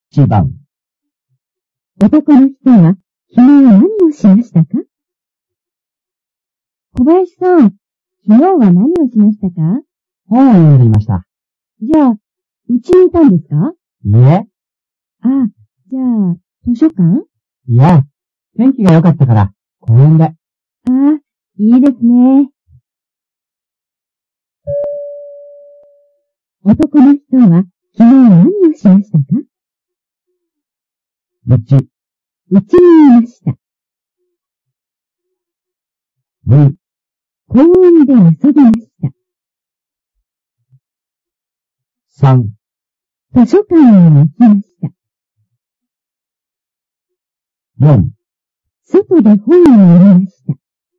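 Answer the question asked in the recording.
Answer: 4: 外で本を読みました。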